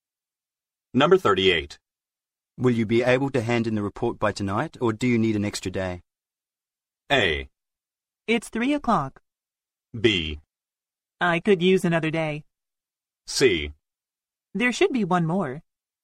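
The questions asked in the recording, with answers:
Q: Will you be able to hand in the report by tonight, or do you need an extra day?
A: B: I could use another day.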